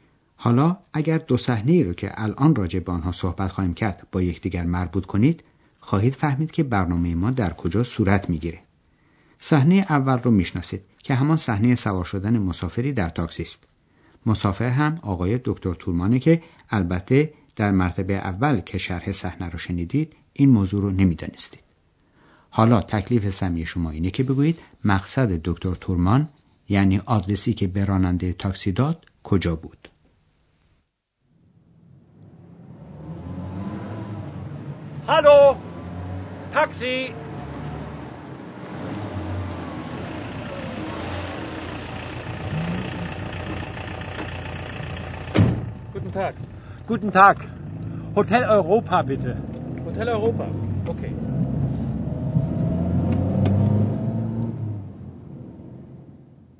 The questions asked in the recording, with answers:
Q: حالا تکلیف سمی شما اینه که بگویید مقصد دکتر تورمان یعنی آدرسی که به راننده تاکسی داد کجا بود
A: پس دکتر تورمان میخواست که راننده تاکسی او رو به هتل اروپا، هتل اوروپا ببره.